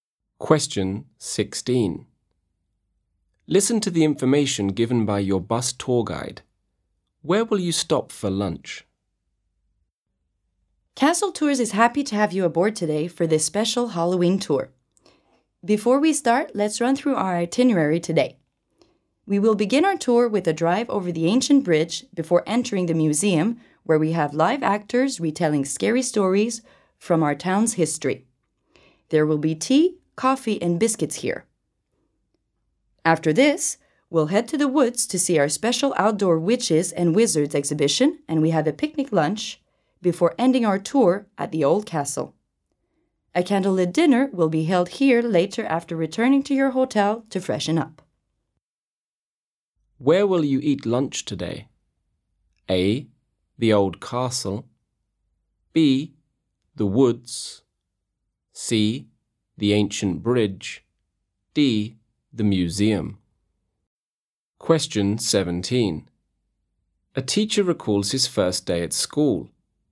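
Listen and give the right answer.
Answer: B: The woods.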